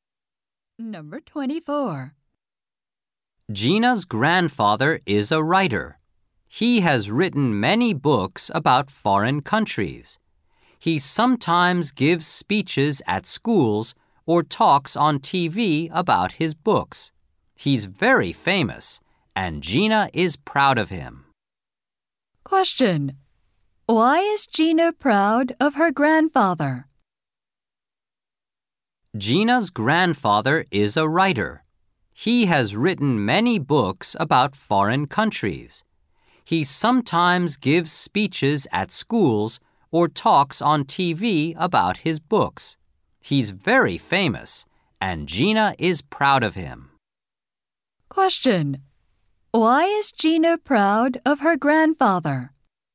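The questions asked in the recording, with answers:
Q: Why is Gina proud of her grandfather?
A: He is a famous writer.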